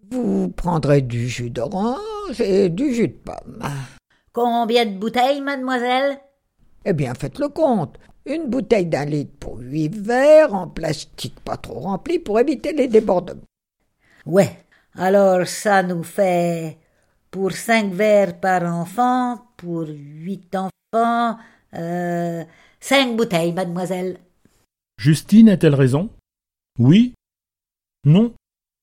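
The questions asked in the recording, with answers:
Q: Justine a-t-elle raison ?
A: Oui (40 verres ÷ 8 = 5 bouteilles)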